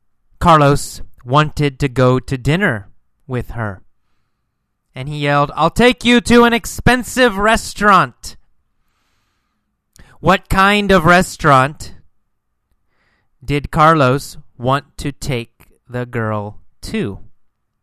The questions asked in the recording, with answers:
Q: What kind of restaurant did Carlos want to take the girl to?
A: What kind? An expensive restaurant, right?